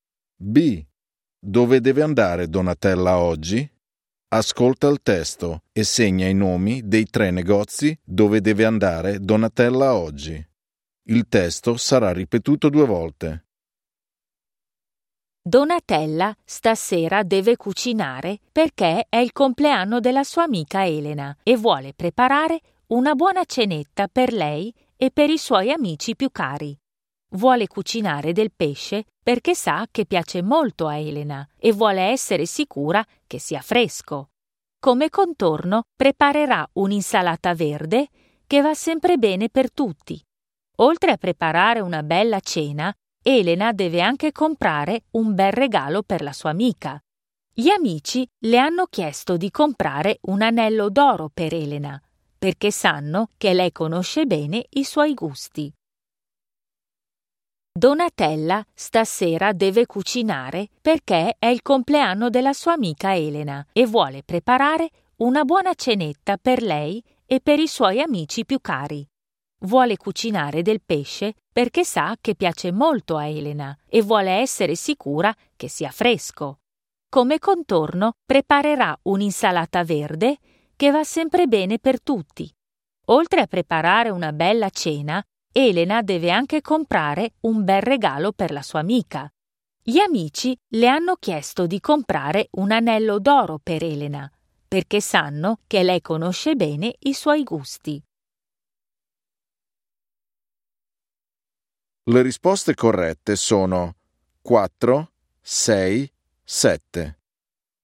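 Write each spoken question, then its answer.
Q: Dove deve andare Donatella oggi?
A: In pescheria, dal fruttivendolo e in gioielleria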